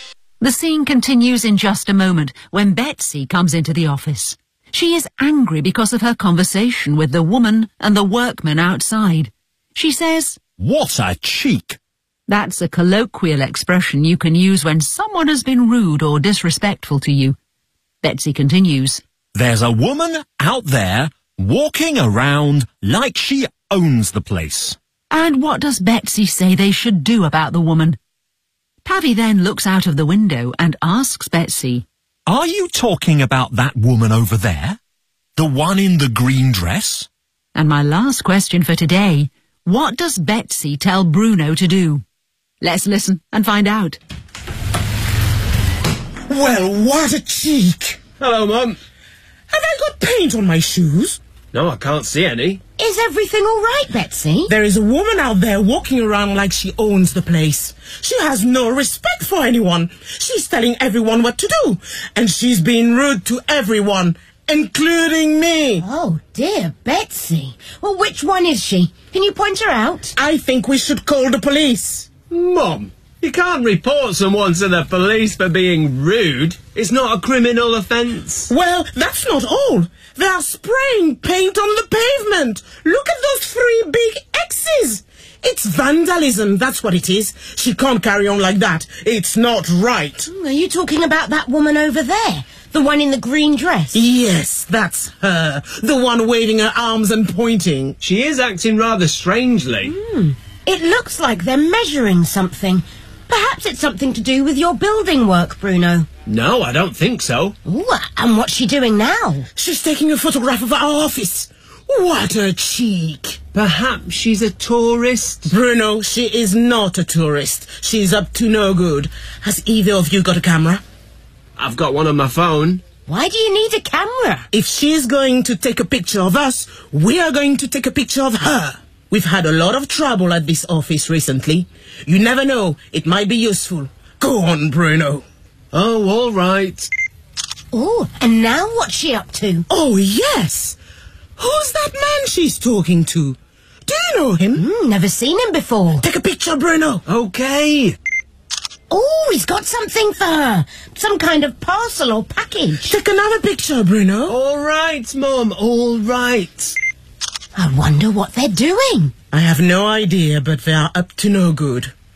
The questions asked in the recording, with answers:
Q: And what does Betsy say they should do about the woman?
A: I think we should call the police.

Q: what does Betsy tell Bruno to do?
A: If she's going to take a picture of us, we're going to take a picture of her.